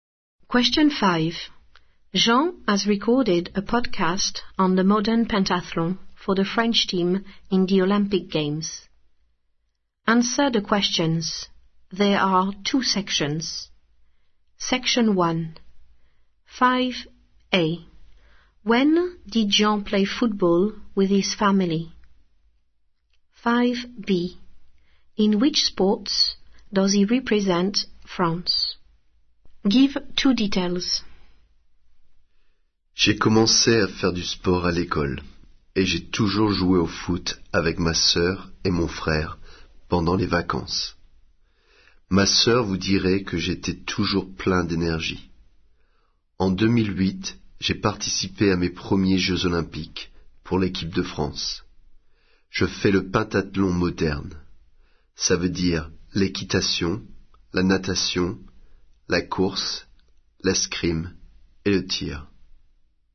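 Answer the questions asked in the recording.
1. During the holidays
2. Modern pentathlon: riding, swimming, running, fencing, shooting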